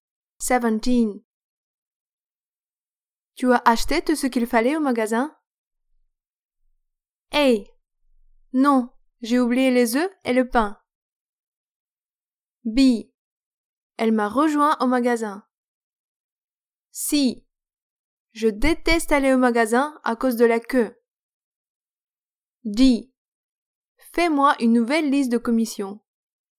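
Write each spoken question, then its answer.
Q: Tu as acheté tout ce qu'il fallait au magasin?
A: A: Non, j'ai oublié les œufs et le pain.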